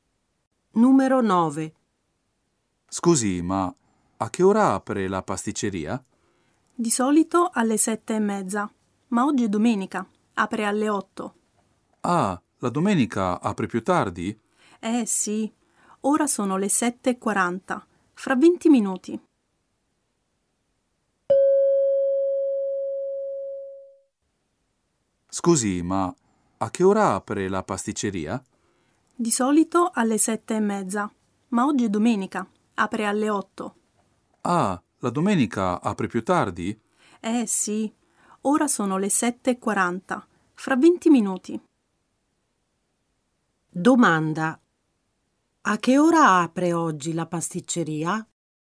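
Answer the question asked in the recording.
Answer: Alle 8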